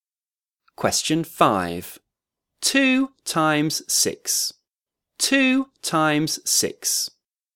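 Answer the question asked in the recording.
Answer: 12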